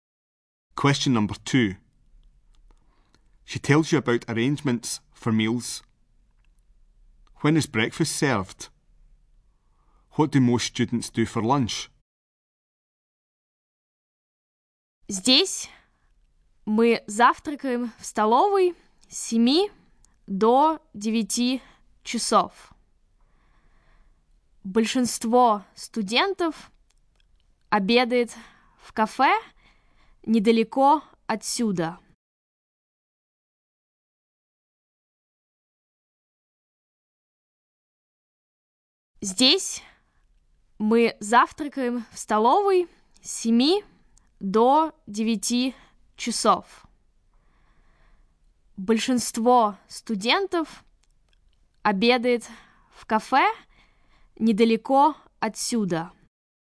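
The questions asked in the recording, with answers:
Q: When is breakfast served?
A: From 7 to 9 o'clock, in the canteen

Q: What do most students do for lunch?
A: They have lunch in a café nearby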